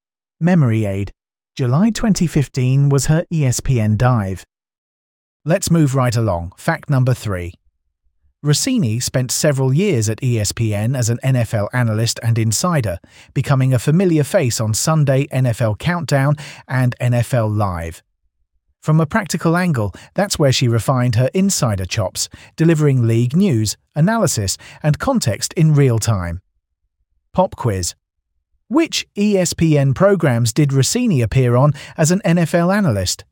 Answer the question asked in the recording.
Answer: Correct answer. Sunday NFL Countdown and NFL Live.